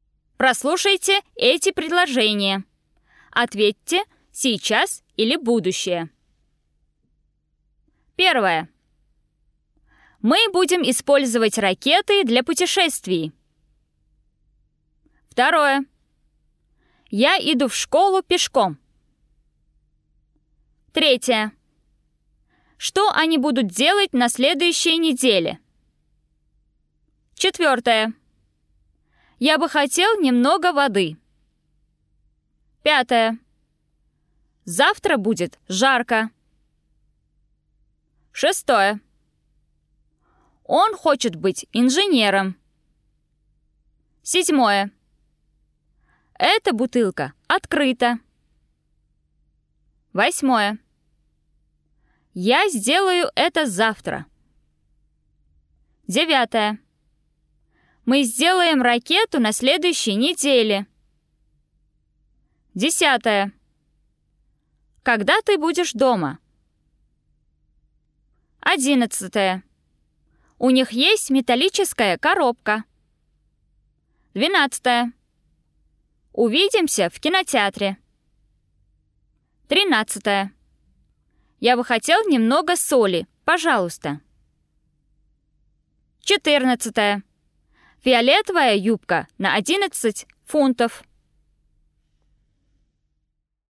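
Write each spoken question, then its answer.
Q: Мы будем использовать ракеты для путешествий.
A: будущее

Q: Я иду в школу пешком.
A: сейчас

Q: Что они будут делать на следующей неделе?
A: будущее

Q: Завтра будет жарко.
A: будущее

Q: Эта бутылка открыта.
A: сейчас

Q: Я сделаю это завтра.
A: будущее

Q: Мы сделаем ракету на следующей неделе.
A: будущее

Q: Когда ты будешь дома?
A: будущее

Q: У них есть металлическая коробка.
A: сейчас

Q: Увидимся в кинотеатре.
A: будущее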